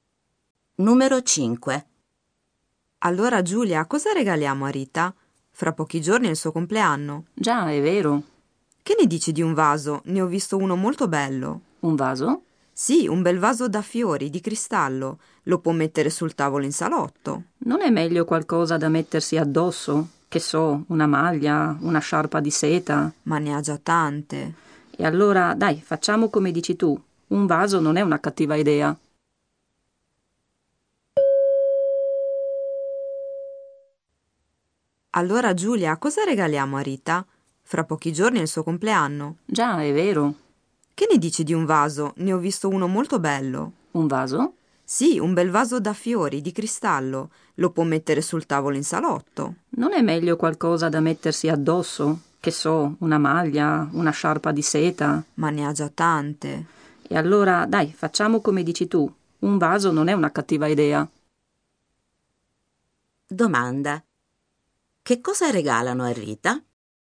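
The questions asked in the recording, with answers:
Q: Domanda. Che cosa regalano a Rita?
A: Un vaso di cristallo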